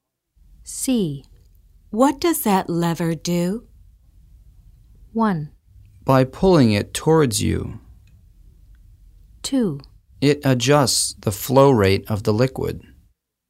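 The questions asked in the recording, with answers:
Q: What does that lever do?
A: 2: It adjusts the flow rate of the liquid.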